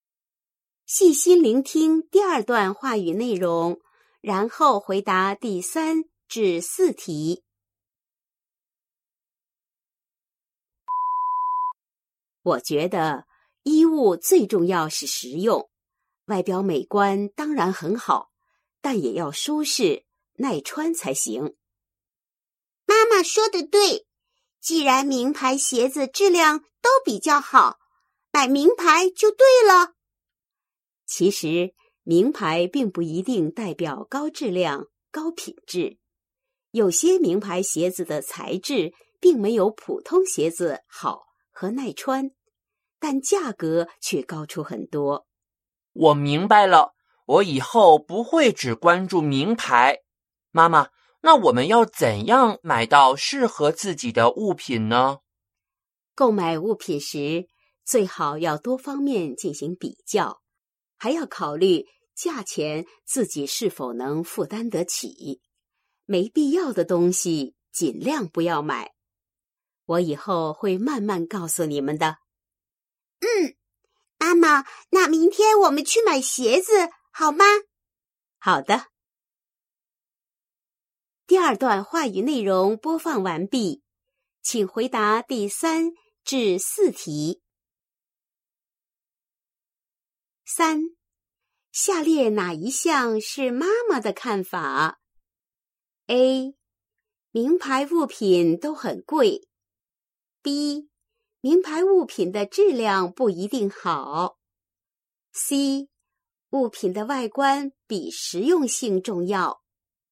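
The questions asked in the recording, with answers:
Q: 下列哪一项是妈妈的看法?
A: B: 名牌物品的质量不一定好。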